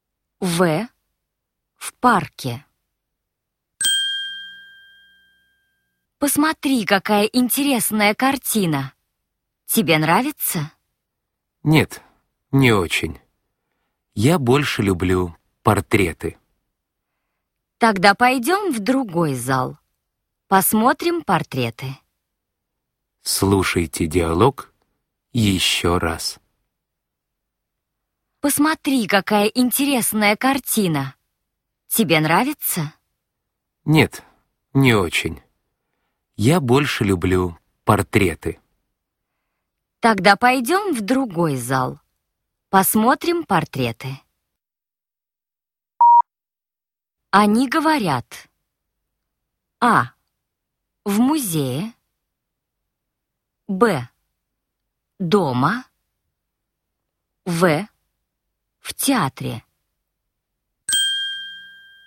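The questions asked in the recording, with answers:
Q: Они говорят:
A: А: В музее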